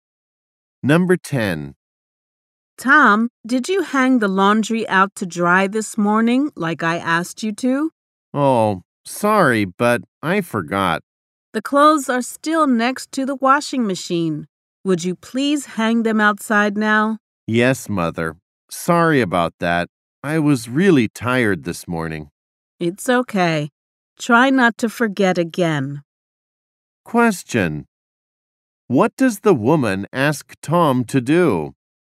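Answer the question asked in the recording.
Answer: Hang the laundry outside to dry now.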